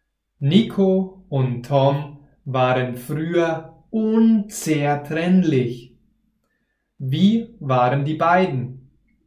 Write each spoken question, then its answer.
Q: Wie waren die beiden?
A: Unzertrennlich. Die beiden waren früher unzertrennlich.